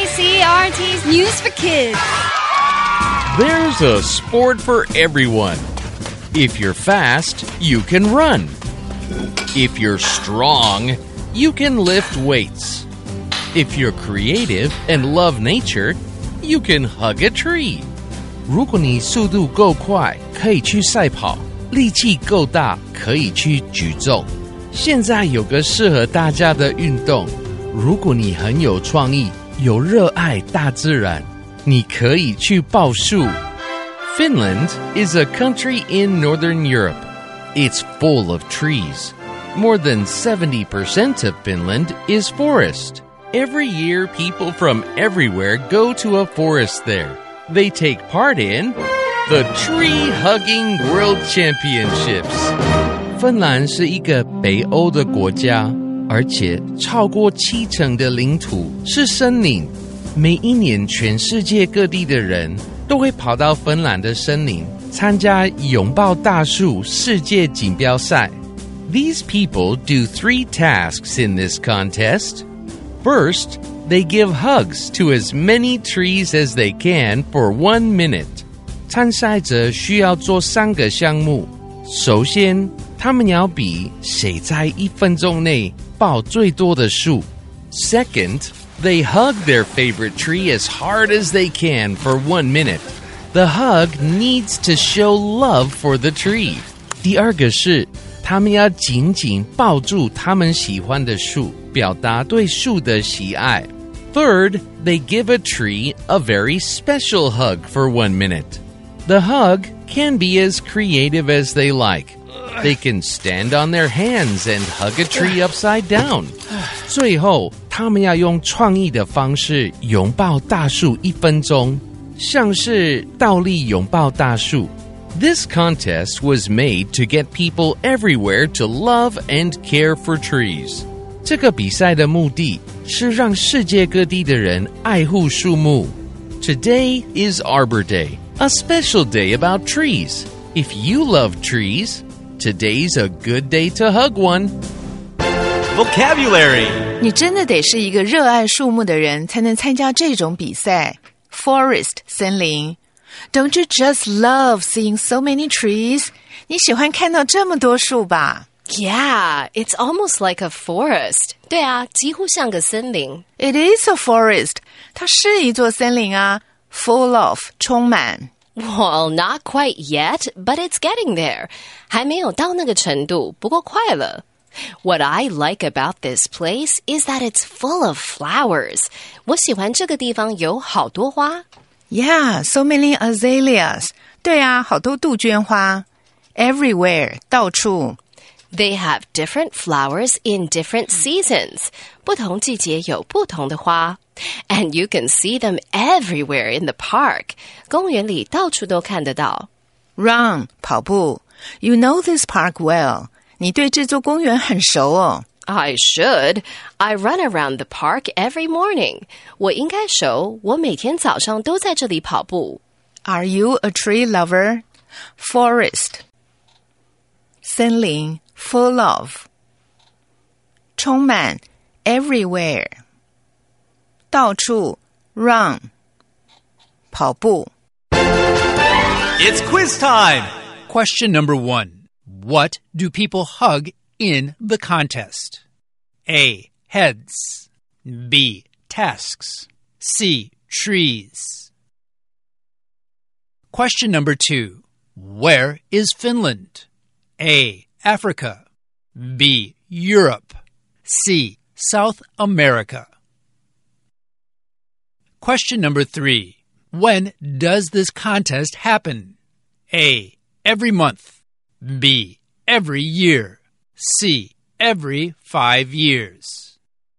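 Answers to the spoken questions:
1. C: Trees.
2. B: Europe.
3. B: Every year.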